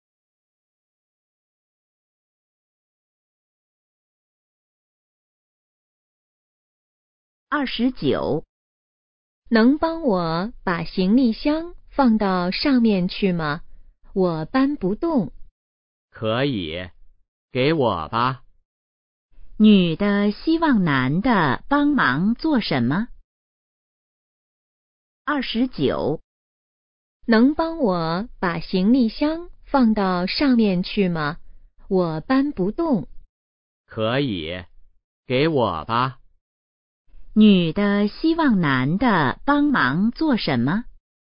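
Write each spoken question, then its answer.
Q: 女的希望男的帮忙做什么?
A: 把行李箱放到上面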